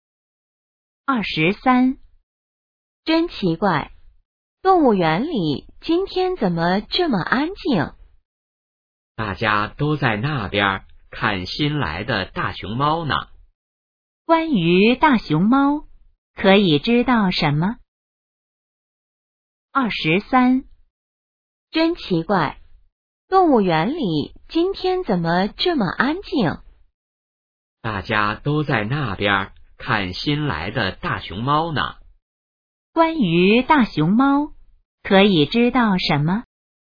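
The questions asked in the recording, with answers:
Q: 关于大熊猫,可以知道什么?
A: 大熊猫是新来的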